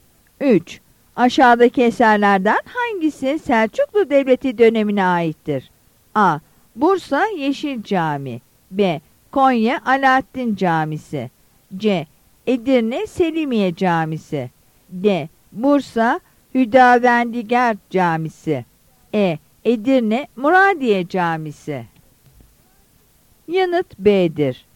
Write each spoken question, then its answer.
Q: Aşağıdaki eserlerden hangisi Selçuklu Devleti dönemine aittir?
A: Yanıt B'dir.